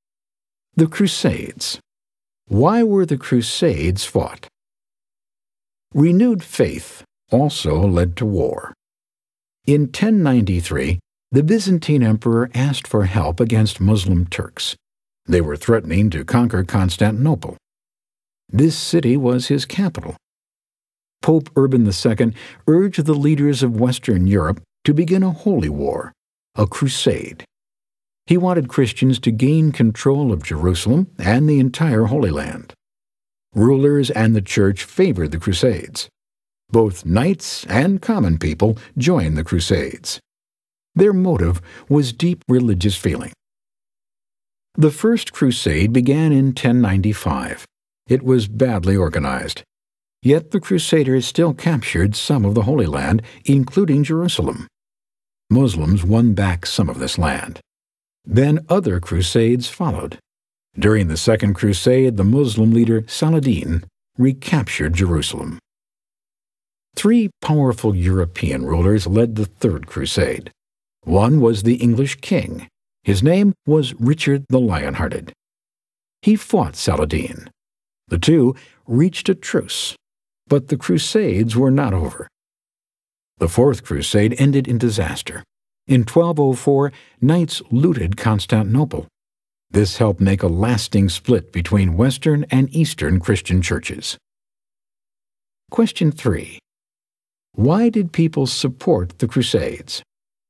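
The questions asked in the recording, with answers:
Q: Why did people support the Crusades?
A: Out of deep religious feeling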